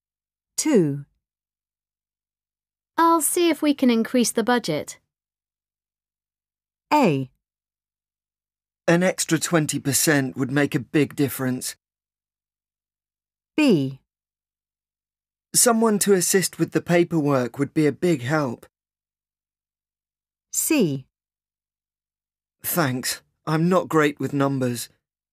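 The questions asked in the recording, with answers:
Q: I'll see if we can increase the budget.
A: A: An extra 20% would make a big difference.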